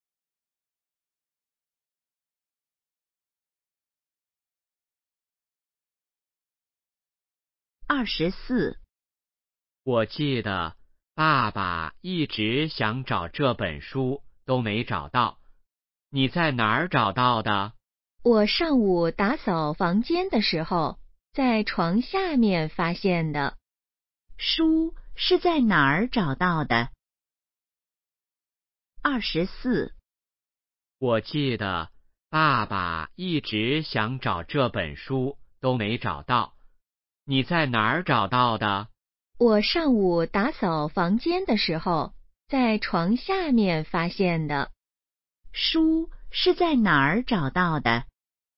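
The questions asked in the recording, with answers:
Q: 书是在哪儿找到的?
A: 床下面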